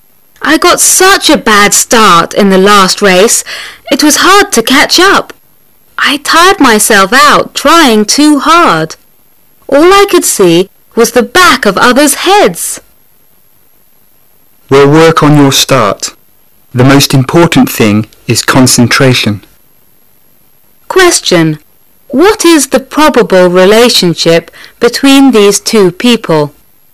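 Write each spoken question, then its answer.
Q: What is the probable relationship between these two people?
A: Coach and athlete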